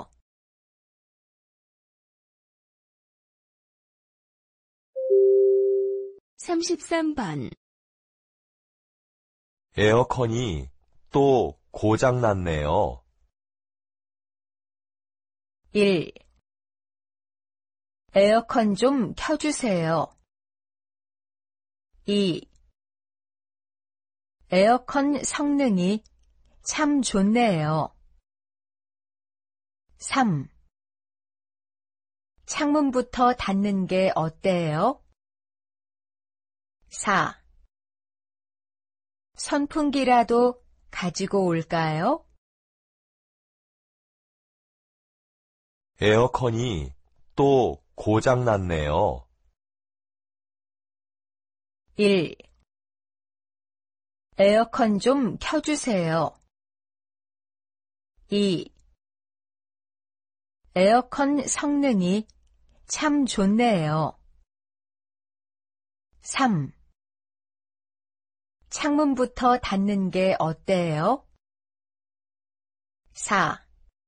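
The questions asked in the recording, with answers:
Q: 에어컨이 또 고장났네요.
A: 4: 선풍기라도 가지고 올까요?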